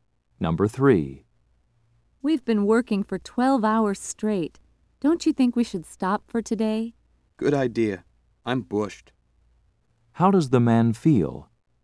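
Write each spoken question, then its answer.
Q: How does the man feel?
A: Very tired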